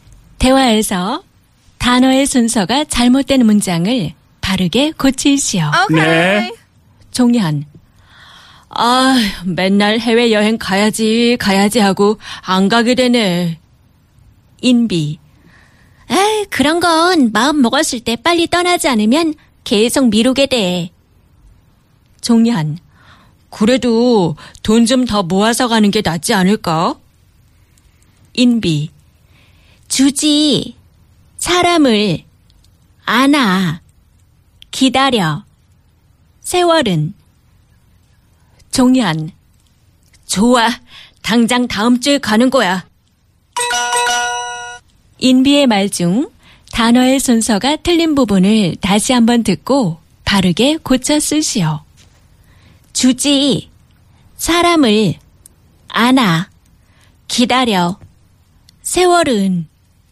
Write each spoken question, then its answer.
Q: 인비의 말 중 단어의 순서가 틀린 부분을 다시 한번 듣고 바르게 고쳐 쓰시오.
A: 세월은 사람을 기다려 주지 않아.